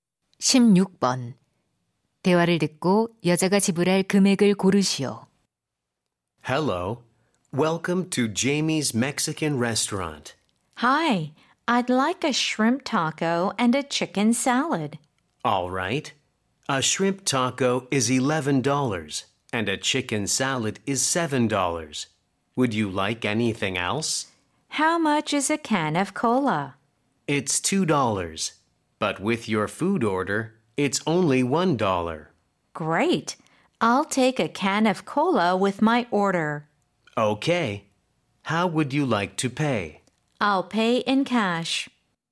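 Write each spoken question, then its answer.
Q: 대화를 듣고 여자가 지불할 금액을 고르시오.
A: $19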